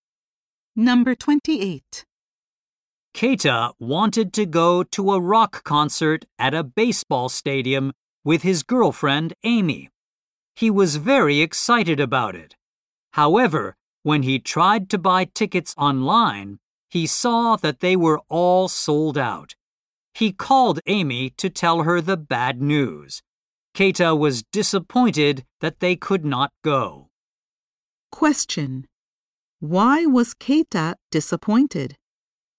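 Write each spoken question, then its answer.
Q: Why was Keita disappointed?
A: The concert tickets were all sold out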